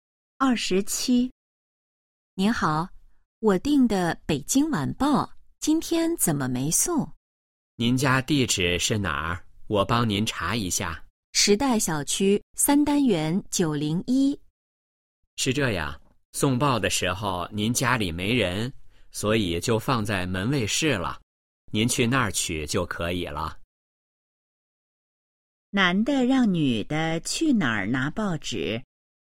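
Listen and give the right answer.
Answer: 门卫室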